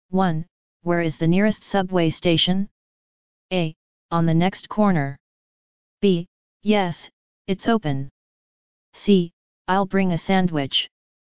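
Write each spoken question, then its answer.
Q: Where is the nearest subway station?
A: A: On the next corner.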